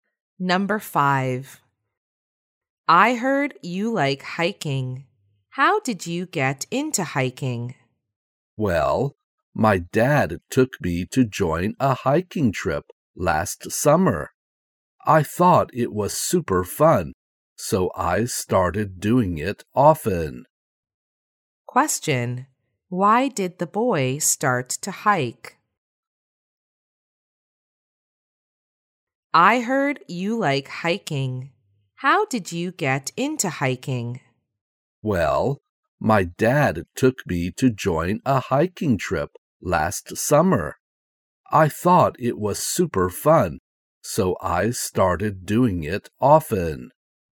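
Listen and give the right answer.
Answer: His dad took him on a hiking trip last summer and he thought it was super fun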